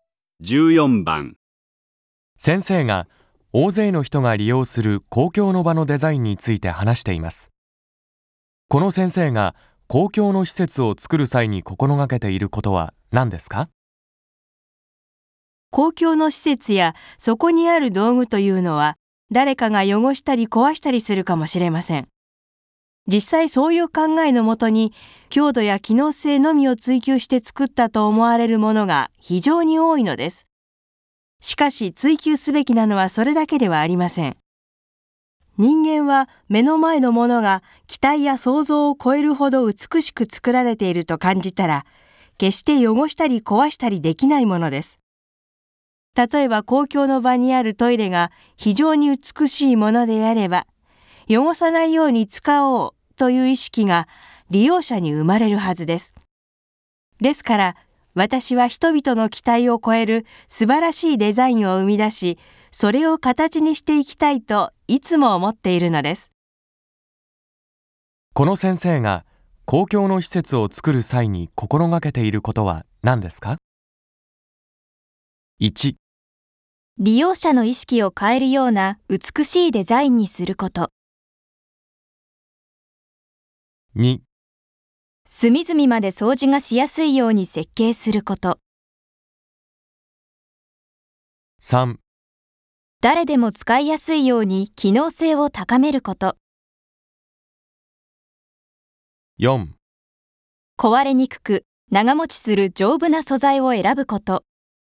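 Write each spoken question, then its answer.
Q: この先生が公共の施設を作る際に心がけていることは何ですか?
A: 1: 利用者の意識を変えるような美しいデザインにすること。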